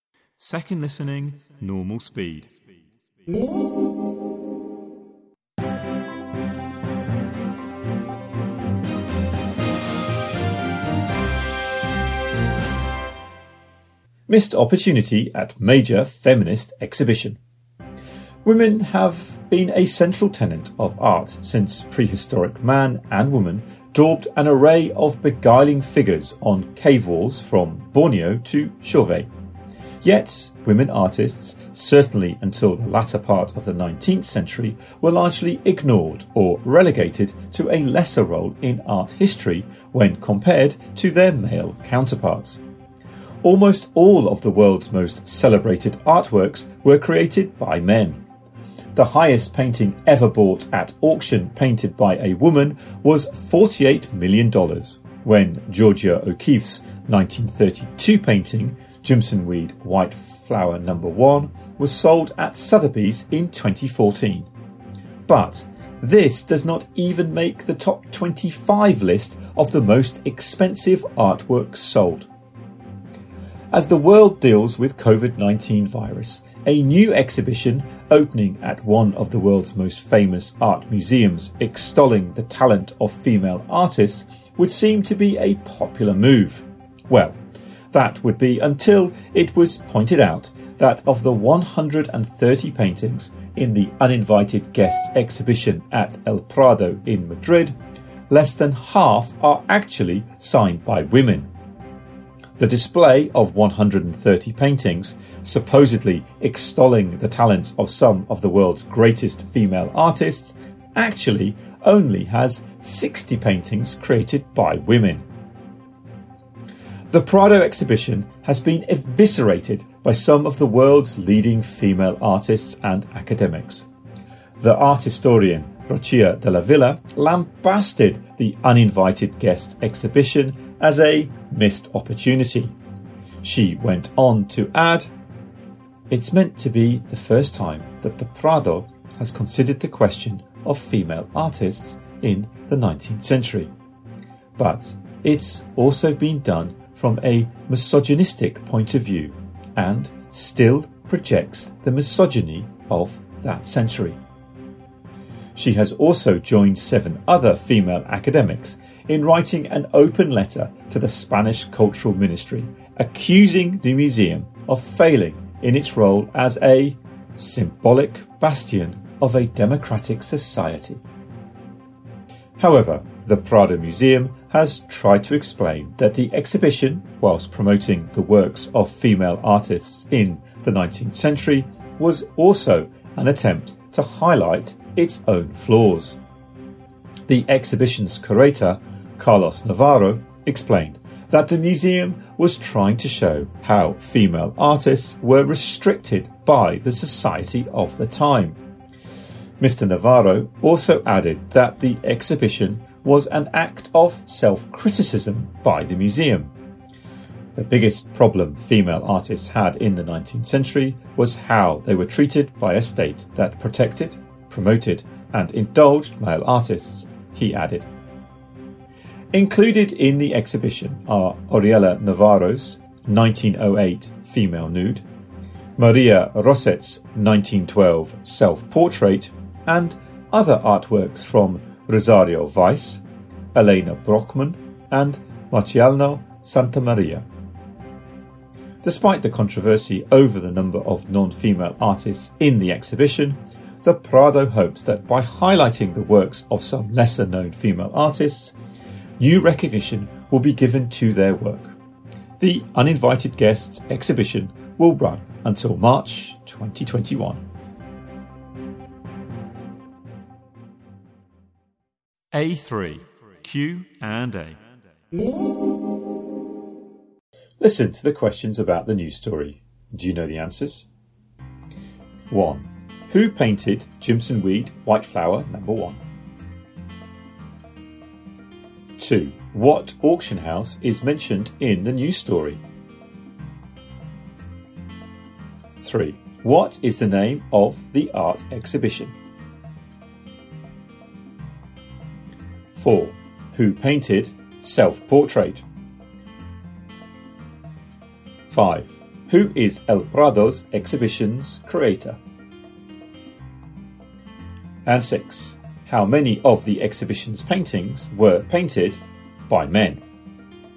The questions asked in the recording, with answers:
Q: Who painted Jimson Weed, White Flower, number 1?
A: 1. Georgia O'Keeffe.

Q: What auction house is mentioned in the news story?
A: 2. Sotheby's.

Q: What is the name of the art exhibition?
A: 3. Uninvited guests.

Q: Who painted Self-Portrait?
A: 4. Maria Roset.

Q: Who is El Prado's exhibition's creator?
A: 5. Carlos Navarro.